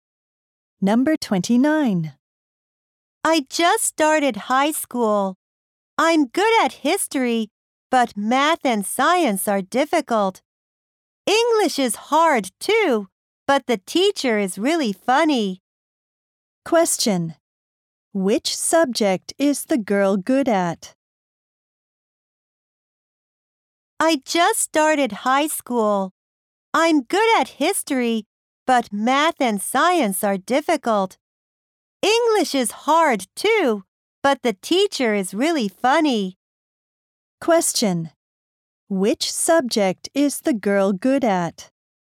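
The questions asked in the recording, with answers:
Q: Which subject is the girl good at?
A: History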